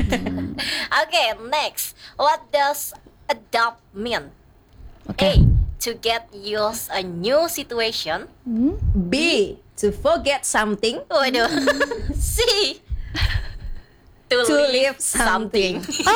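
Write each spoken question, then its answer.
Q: What does adapt mean?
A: A: To get used a new situation.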